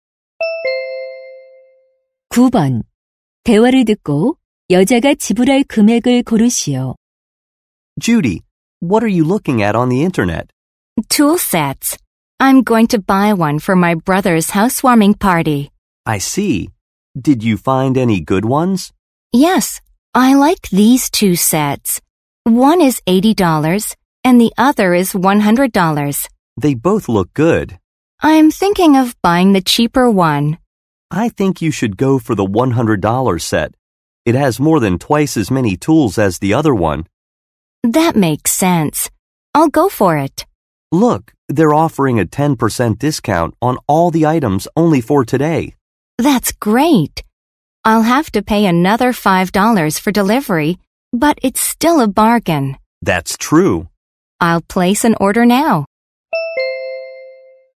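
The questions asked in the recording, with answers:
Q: 대화를 듣고 여자가 지불할 금액을 고르시오.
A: $95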